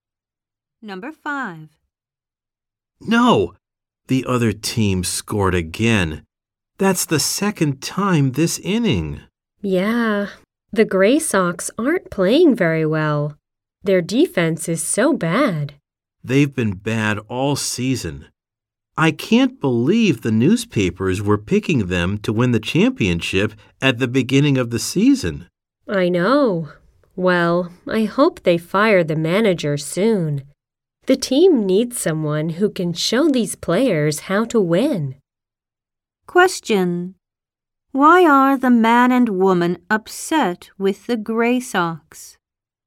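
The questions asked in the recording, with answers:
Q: Why are the man and woman upset with the Gray Sox?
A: The team is playing badly and its defense is bad.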